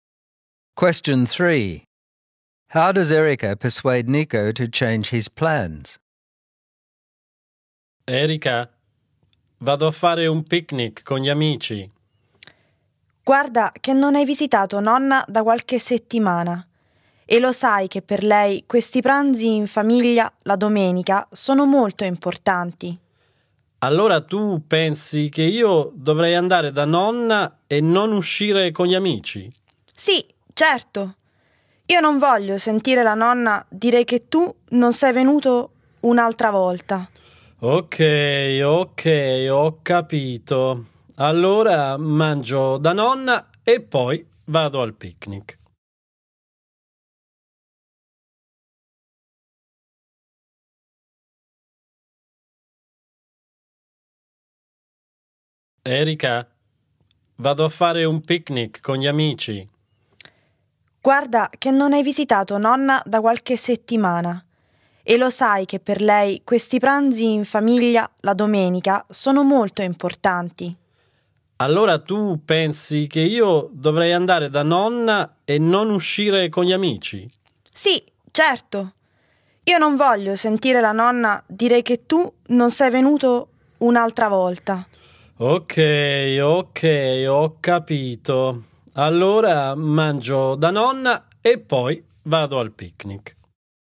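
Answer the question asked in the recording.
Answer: She reminds him that he hasn't visited Grandma for weeks and that Sunday family lunches matter to her, so he decides to eat at Grandma's before going to the picnic.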